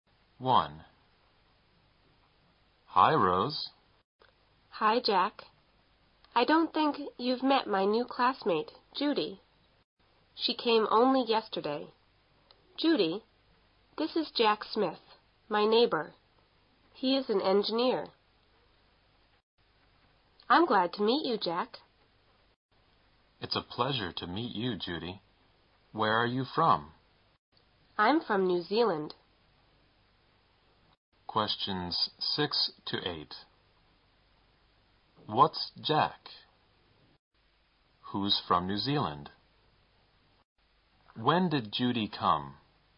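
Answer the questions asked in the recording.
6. An engineer
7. Judy
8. Yesterday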